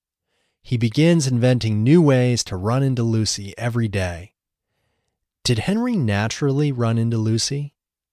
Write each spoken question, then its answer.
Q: Did Henry naturally run into Lucy?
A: No, he planned to run into Lucy.